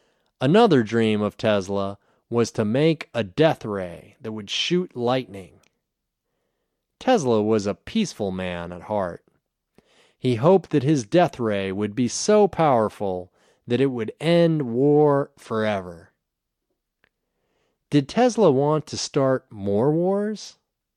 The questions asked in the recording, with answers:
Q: Did Tesla want to start more wars?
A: No, Tesla didn't want to start more wars.